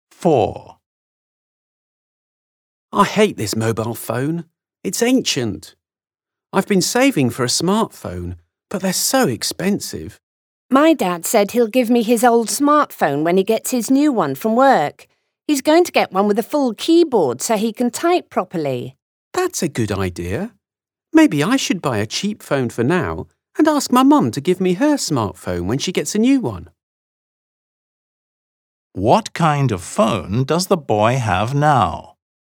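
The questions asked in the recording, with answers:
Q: What kind of phone does the boy have now?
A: An old (ancient) mobile phone, not a smartphone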